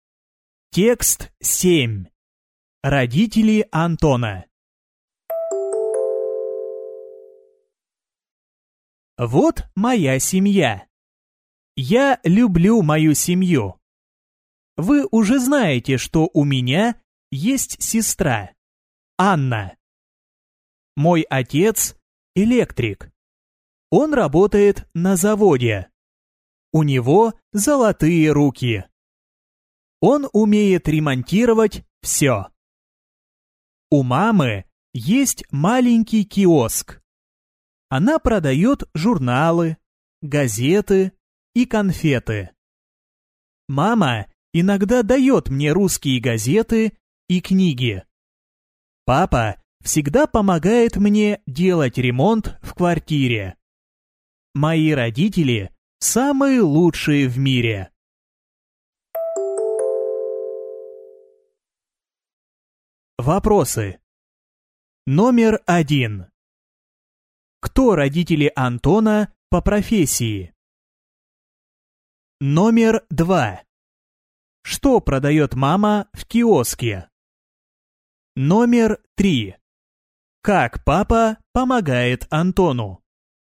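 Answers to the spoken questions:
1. Отец — электрик на заводе, у мамы есть маленький киоск
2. Журналы, газеты и конфеты
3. Помогает делать ремонт в квартире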